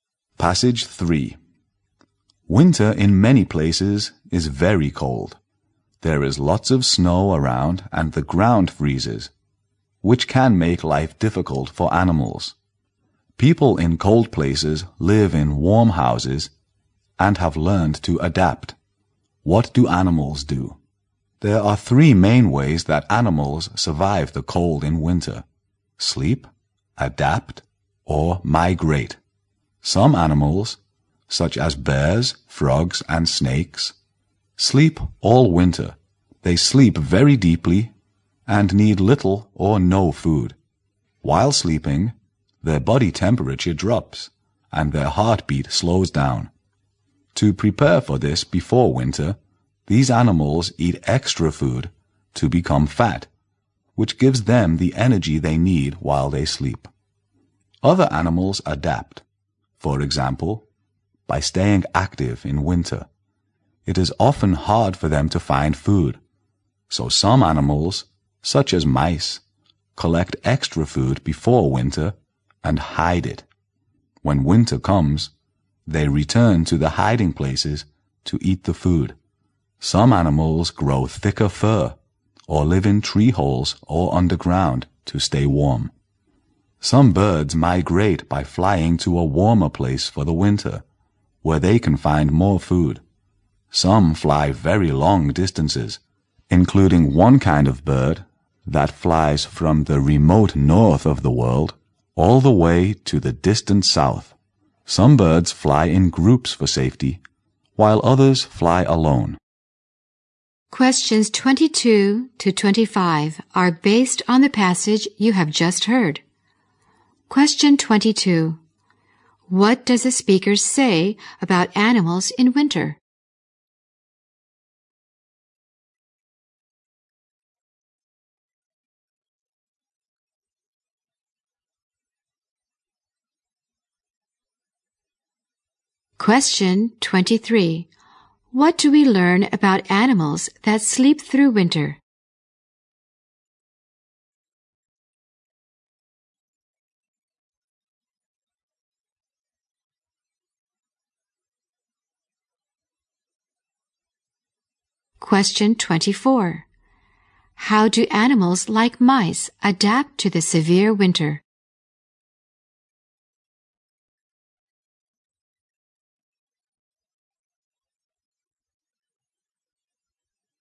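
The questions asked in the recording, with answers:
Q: How do animals like mice adapt to the severe winter?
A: They collect extra food before winter and hide it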